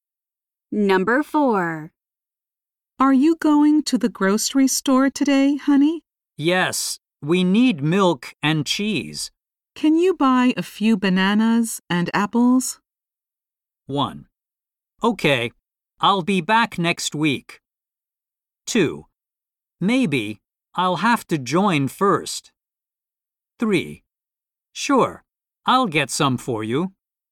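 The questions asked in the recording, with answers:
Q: Can you buy a few bananas and apples?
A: 3: Sure, I'll get some for you.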